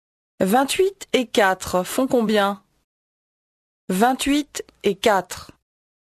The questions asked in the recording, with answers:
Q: 28 et 4 font combien?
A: 32.